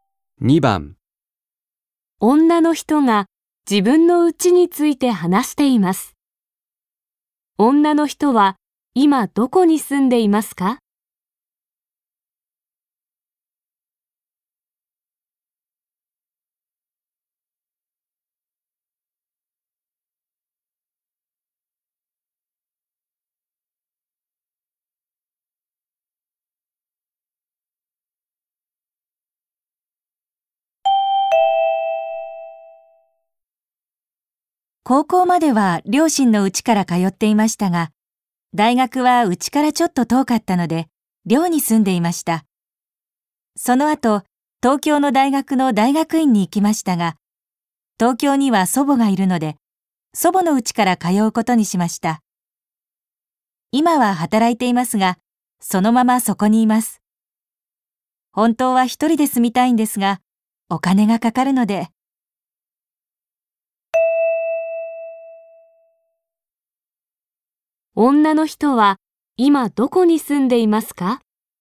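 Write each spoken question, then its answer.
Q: 女の人は今どこに住んでいますか?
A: 祖母の家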